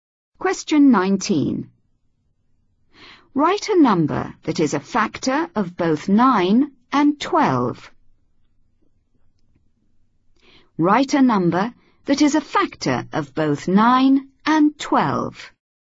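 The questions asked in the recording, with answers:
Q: Write a number that is a factor of both 9 and 12.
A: 1 or 3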